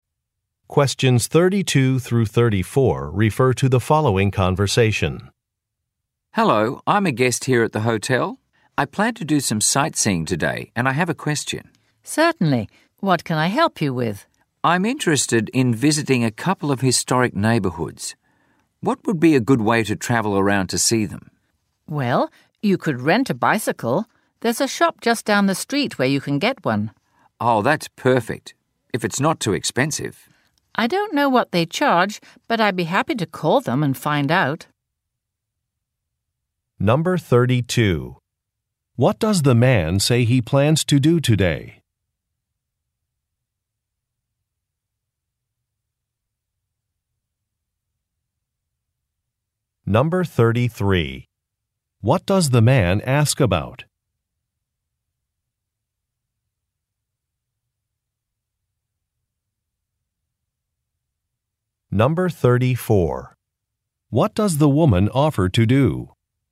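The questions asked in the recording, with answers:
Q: What does the man say he plans to do today?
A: Do some sightseeing

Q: What does the man ask about?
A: A good way to travel around to see historic neighbourhoods

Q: What does the woman offer to do?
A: Call the bicycle shop to find out the price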